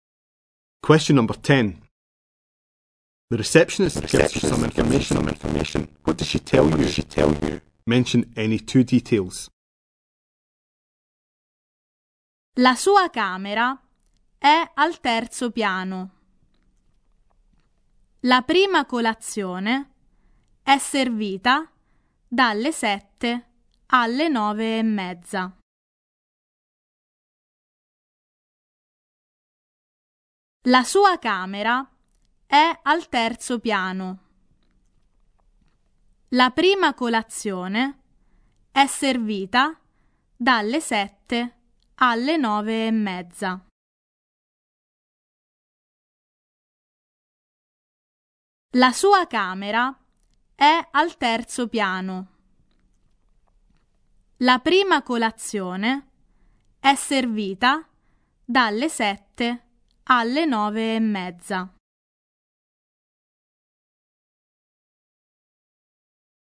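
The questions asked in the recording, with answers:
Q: What does she tell you? Mention any two details.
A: The room is on the third floor; breakfast is served from 7 to 9:30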